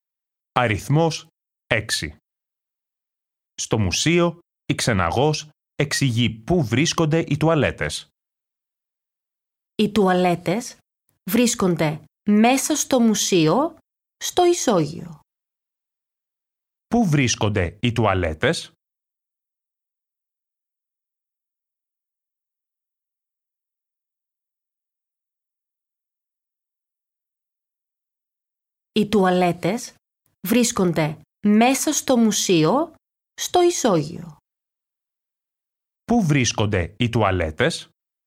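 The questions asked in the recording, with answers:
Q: Πού βρίσκονται οι τουαλέτες?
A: μέσα στο μουσείο, στο ισόγειο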